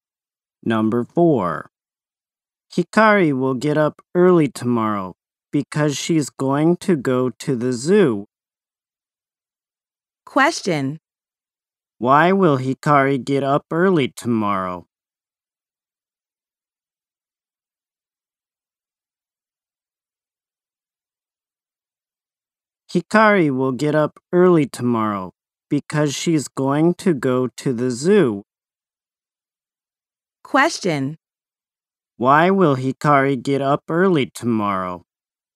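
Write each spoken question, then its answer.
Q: Why will Hikari get up early tomorrow?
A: Because she's going to go to the zoo.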